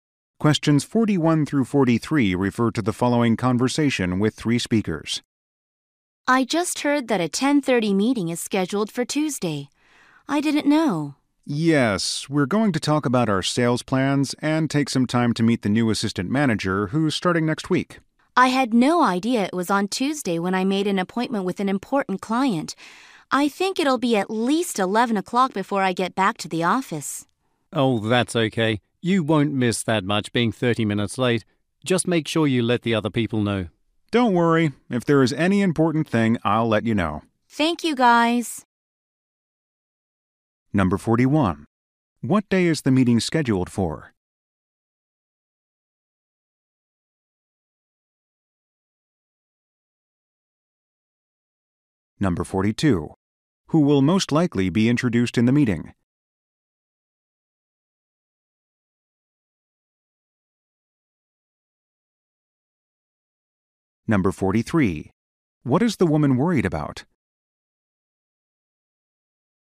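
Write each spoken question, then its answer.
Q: What day is the meeting scheduled for?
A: Tuesday

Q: Who will most likely be introduced in the meeting?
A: The new assistant manager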